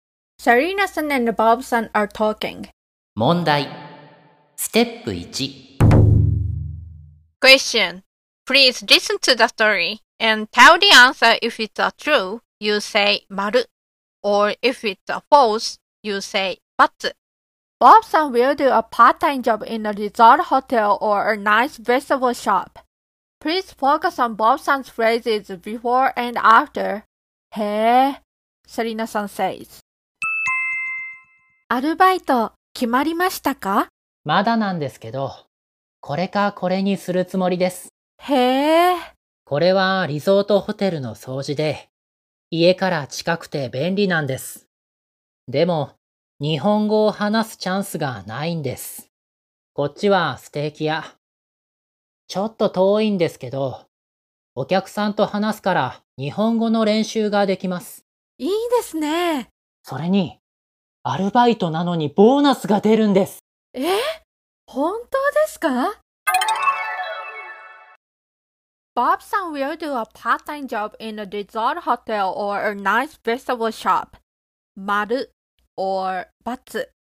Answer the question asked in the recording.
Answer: So it is batsu?